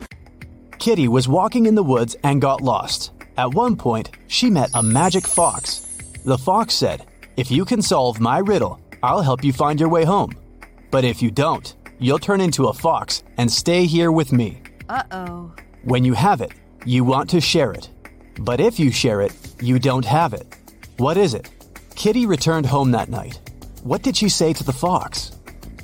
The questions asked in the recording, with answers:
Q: What did she say to the fox?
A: It's a secret.